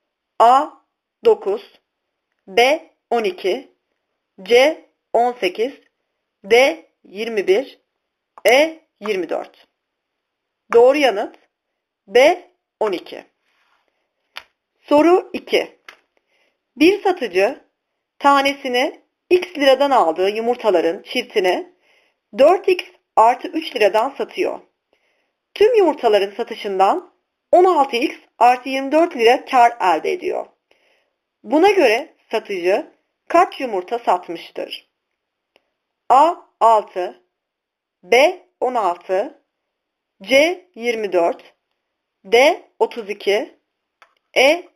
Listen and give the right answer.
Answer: Doğru yanıt B. 16